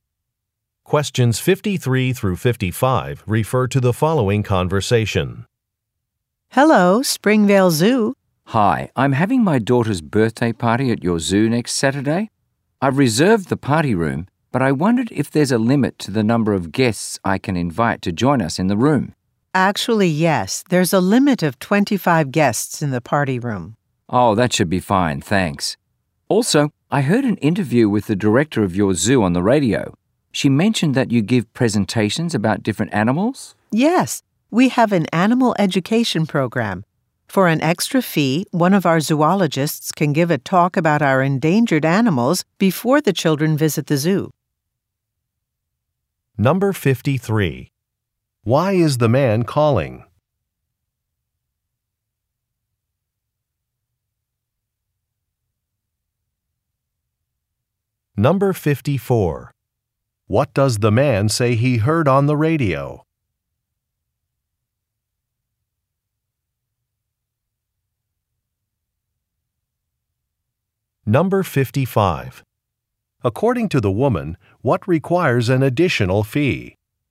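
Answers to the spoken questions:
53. To ask about the guest limit for the party room
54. An interview with the zoo director
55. A talk by a zoologist about endangered animals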